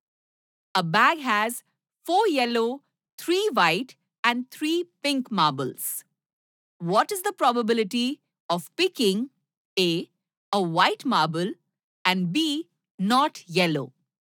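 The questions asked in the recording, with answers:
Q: What is the probability of picking A, a white marble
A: 3/10

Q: B, not yellow?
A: 6/10 = 3/5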